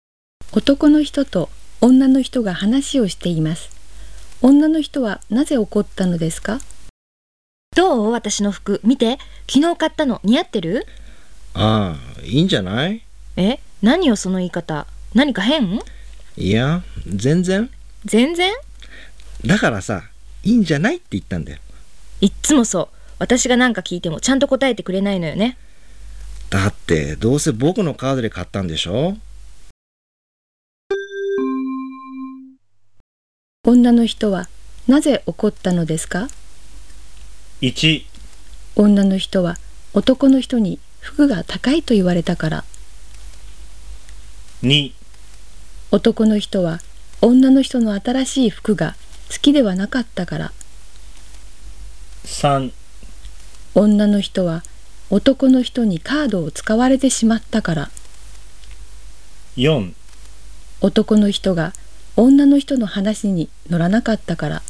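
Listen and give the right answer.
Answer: 4: 男の人が女の人の話に乗らなかったから。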